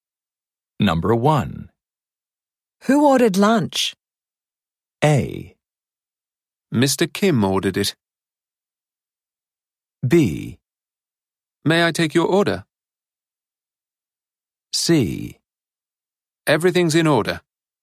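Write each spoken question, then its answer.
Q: Who ordered lunch?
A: A: Mr. Kim ordered it.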